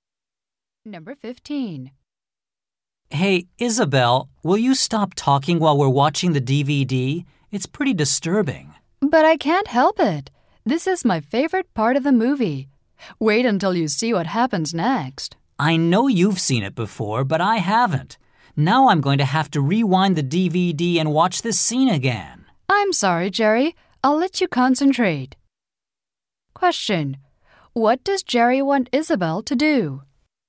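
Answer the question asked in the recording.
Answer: Stop talking during the DVD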